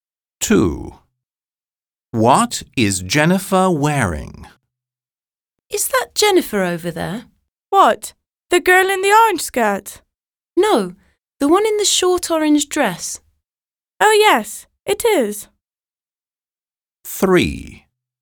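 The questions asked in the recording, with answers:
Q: What is Jennifer wearing?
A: A short orange dress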